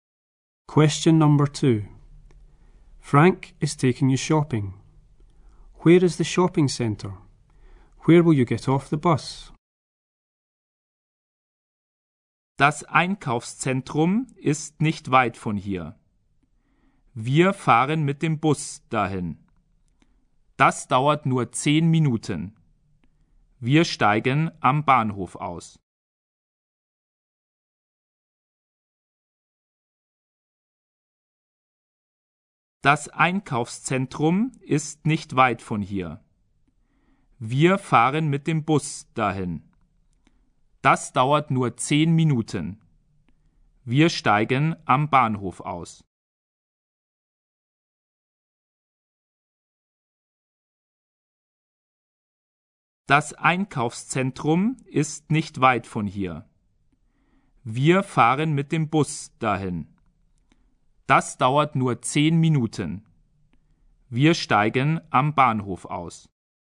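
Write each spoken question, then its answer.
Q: Where is the shopping centre?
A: Not far from here (10 minutes by bus)

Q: Where will you get off the bus?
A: At the station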